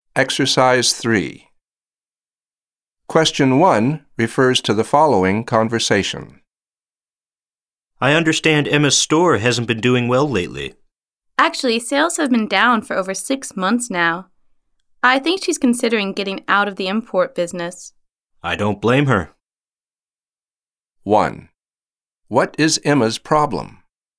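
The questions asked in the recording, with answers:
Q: What is Emma's problem?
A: Her store's sales have been down for over six months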